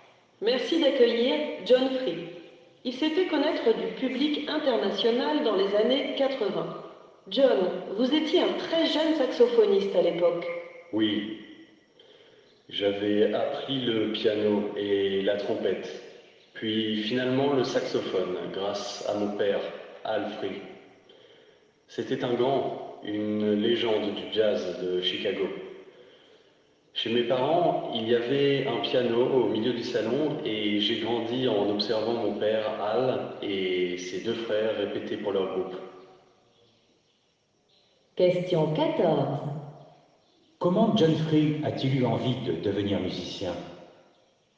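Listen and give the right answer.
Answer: Grâce à son père, Al Free, une légende du jazz : il a grandi en regardant son père et ses oncles répéter.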